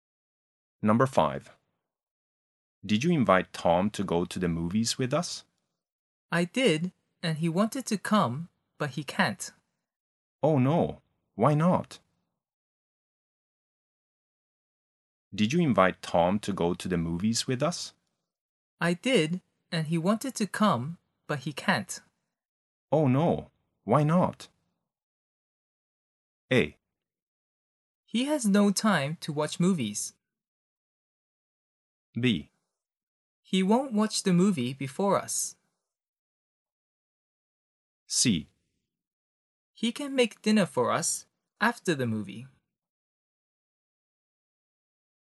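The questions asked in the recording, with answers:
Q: Oh no, why not?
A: A: He has no time to watch movies.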